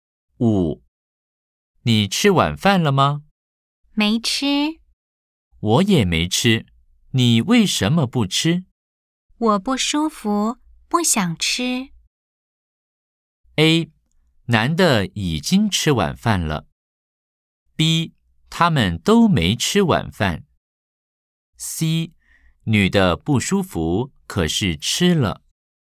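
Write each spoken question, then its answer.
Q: A, 男的已经吃晚饭了。B, 他们都没吃晚饭。C, 女的不舒服,可是吃了。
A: B: 他们都没吃晚饭。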